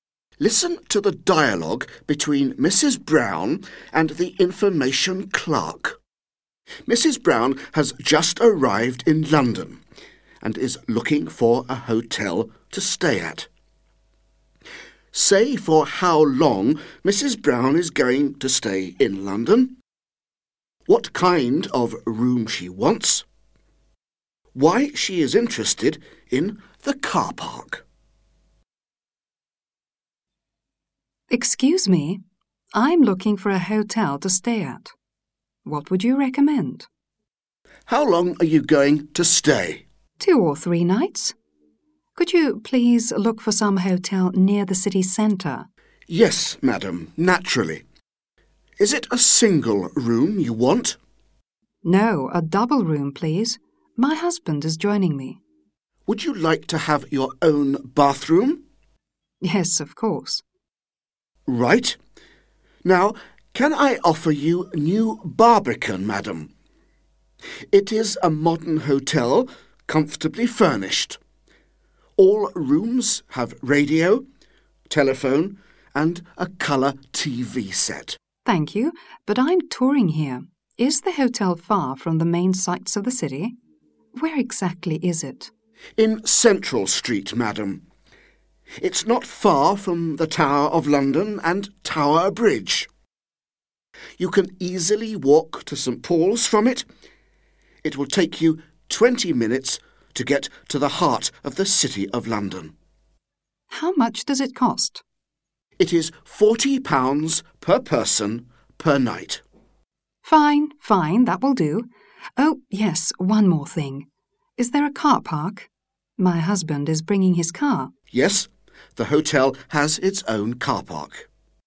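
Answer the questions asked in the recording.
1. 2 or 3 nights
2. a double room with her own bathroom
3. her husband is bringing his car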